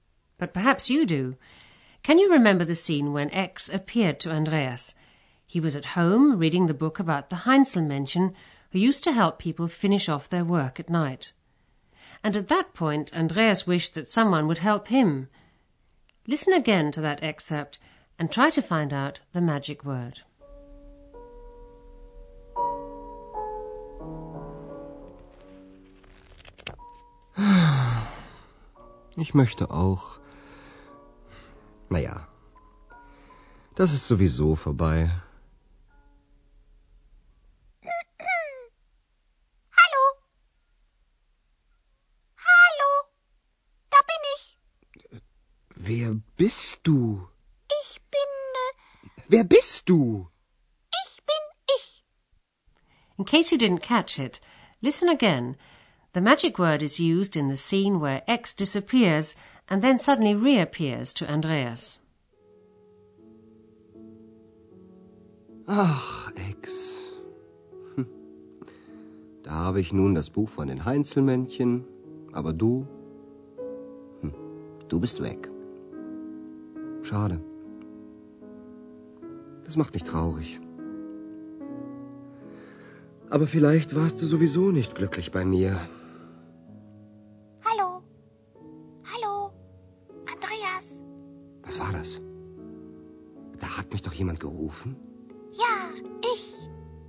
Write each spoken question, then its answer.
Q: Listen again to that excerpt and try to find out the magic word.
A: The magic word is sowieso.